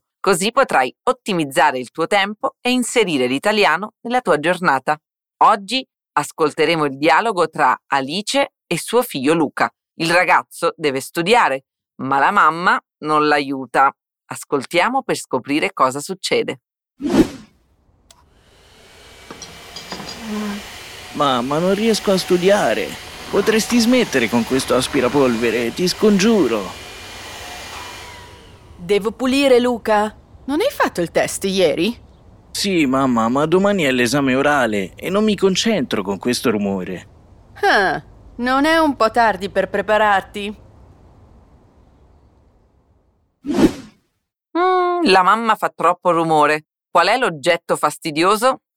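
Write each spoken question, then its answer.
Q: Qual è l'oggetto fastidioso?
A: l'aspirapolvere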